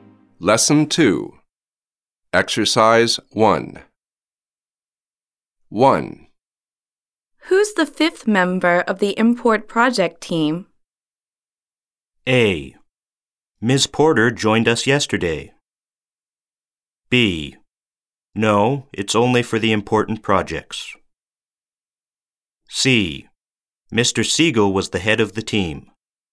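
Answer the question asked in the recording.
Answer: A: Ms. Porter joined us yesterday.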